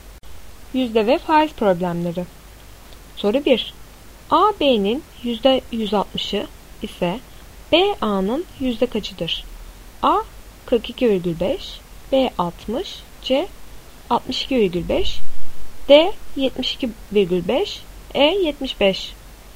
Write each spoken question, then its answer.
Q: A B'nin %160'ı ise B A'nın yüzde kaçıdır?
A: Doğru cevap C 62,5.